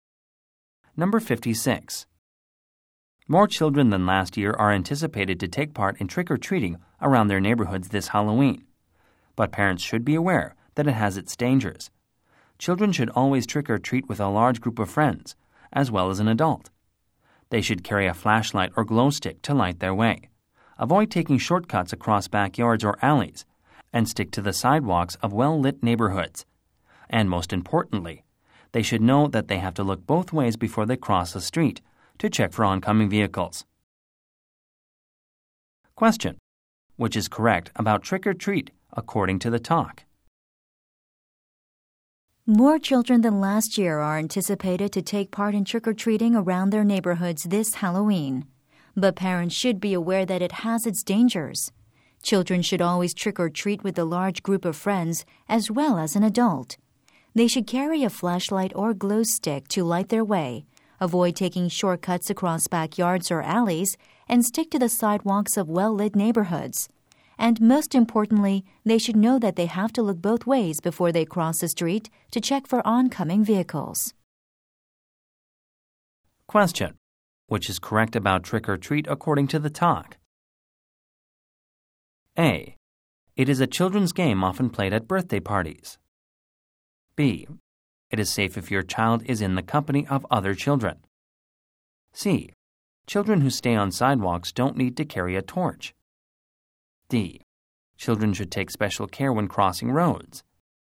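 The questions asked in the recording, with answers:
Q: Which is correct about trick-or-treat according to the talk?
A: D: Children should take special care when crossing roads.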